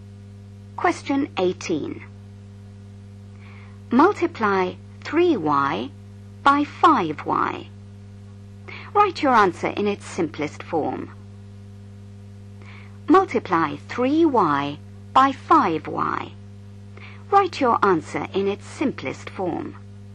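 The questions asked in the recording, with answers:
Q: Multiply 3y by 5y.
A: 15y2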